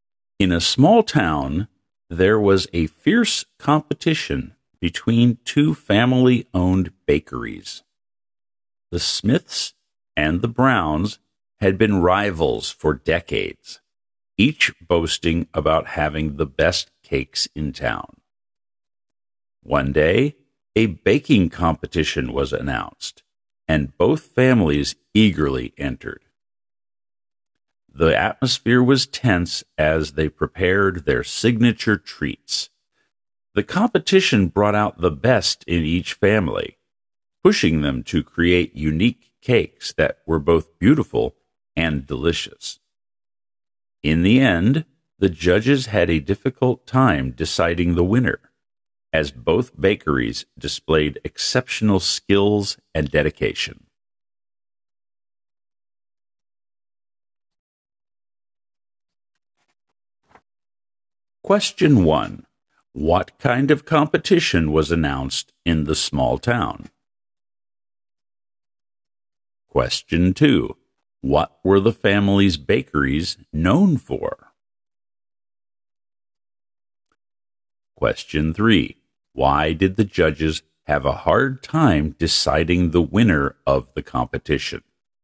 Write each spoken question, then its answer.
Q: What kind of competition was announced in the small town?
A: A baking competition.

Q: What were the family's bakeries known for?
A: Both claimed to make the best cakes in town.

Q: Why did the judges have a hard time deciding the winner of the competition?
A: Both bakeries displayed exceptional skills and dedication.